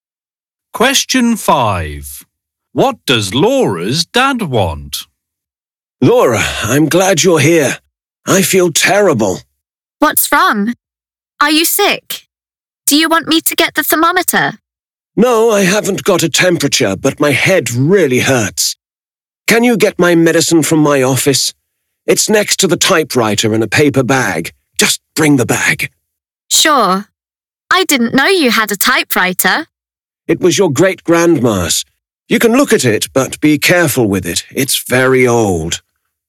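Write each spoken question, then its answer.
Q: What does Laura's dad want?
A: His medicine (the paper bag from his office).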